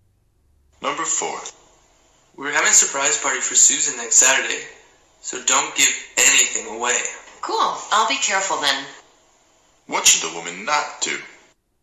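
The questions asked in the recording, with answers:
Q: What should the woman not do?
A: Give away the surprise party for Susan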